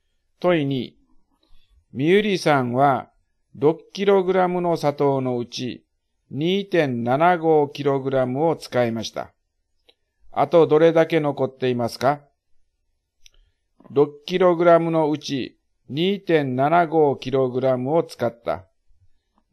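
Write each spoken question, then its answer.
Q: あとどれだけ残っていますか?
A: 3.25kg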